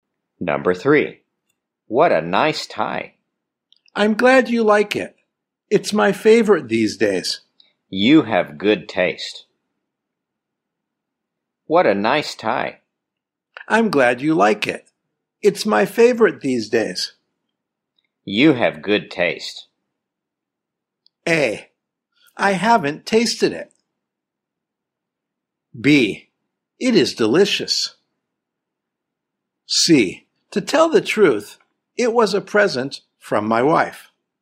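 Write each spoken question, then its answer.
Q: You have good taste.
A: C: To tell the truth, it was a present from my wife.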